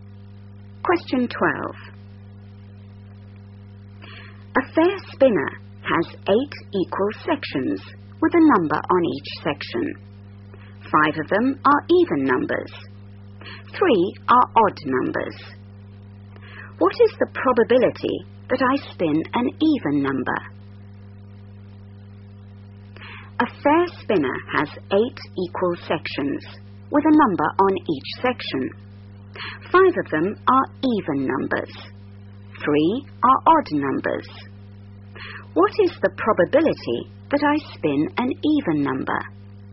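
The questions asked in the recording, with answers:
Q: What is the probability that I spin an even number?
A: 5/8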